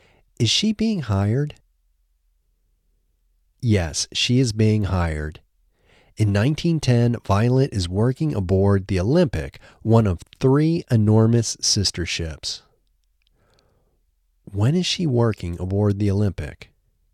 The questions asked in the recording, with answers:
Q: When is she working aboard the Olympic?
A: She is working aboard the Olympic in 1910.